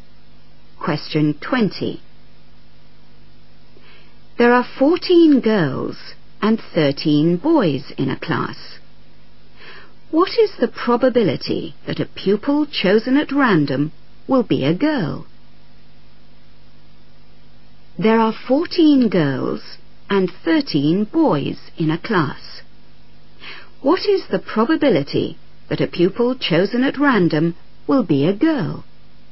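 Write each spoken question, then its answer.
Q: What is the probability that a pupil chosen at random will be a girl?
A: 14/27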